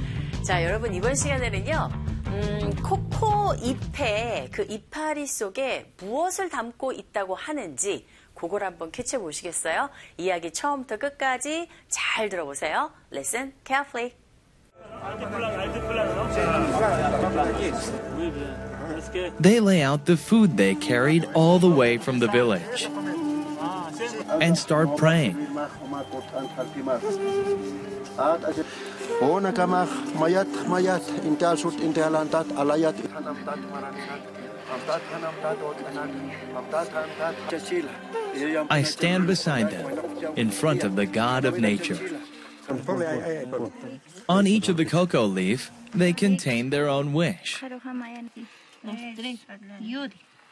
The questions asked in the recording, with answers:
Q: 코코 잎에 그 이파리 속에 무엇을 담고 있다고 하는지 그걸 한번 캐치해 보시겠어요?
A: 잎 하나하나에 사람들의 그 소망이 담겨있다